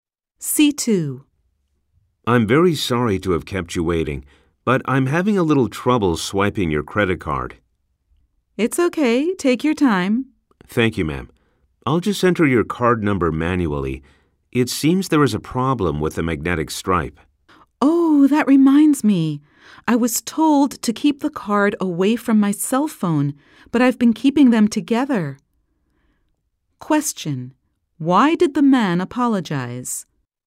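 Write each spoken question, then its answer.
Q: Why did the man apologize?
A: For keeping her waiting while he had trouble swiping her credit card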